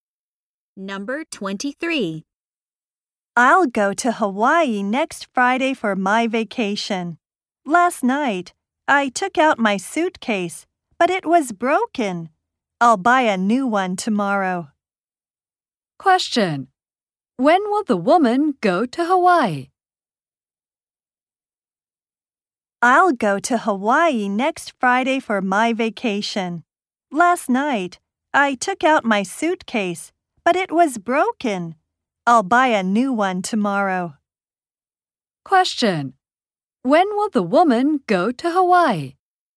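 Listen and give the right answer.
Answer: Next Friday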